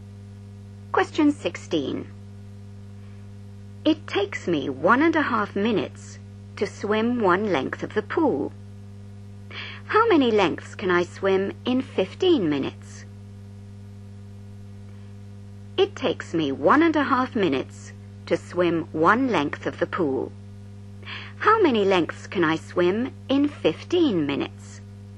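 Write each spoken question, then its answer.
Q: How many lengths can I swim in 15 minutes?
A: 10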